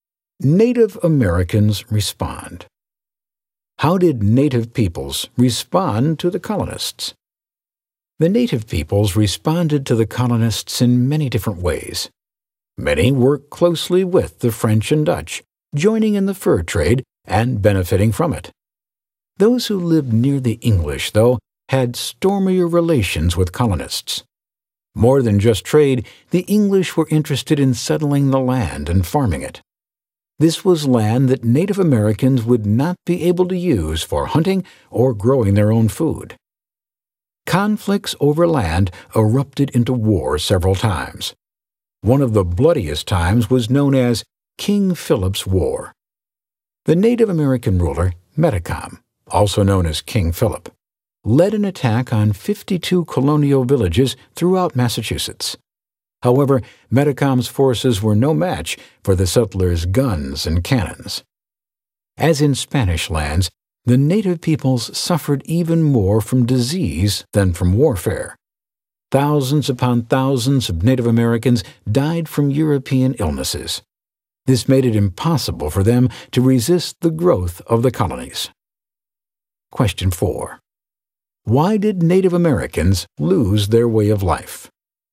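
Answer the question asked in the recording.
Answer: Colonists took their land, and war and European diseases killed many of them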